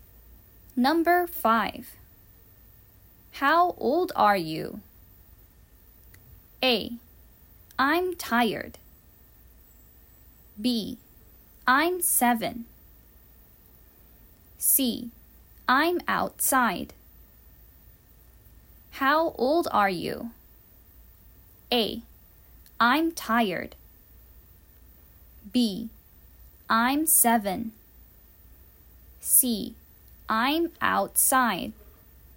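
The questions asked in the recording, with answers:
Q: How old are you?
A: B: I'm 7.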